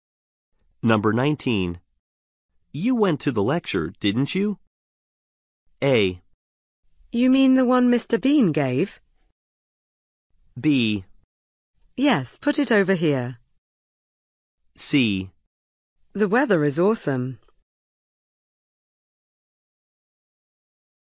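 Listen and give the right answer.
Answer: A: You mean the one Mr. Bean gave?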